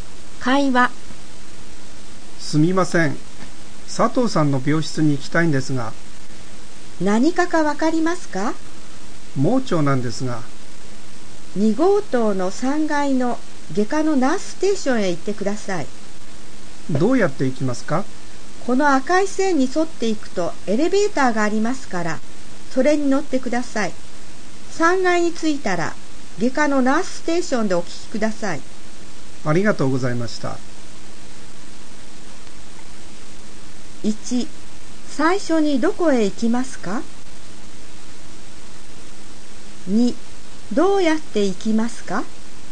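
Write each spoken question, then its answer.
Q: 最初にどこへ行きますか?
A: 2号棟3階の外科のナースステーション

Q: どうやって行きますか?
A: 赤い線に沿って行き、エレベーターに乗る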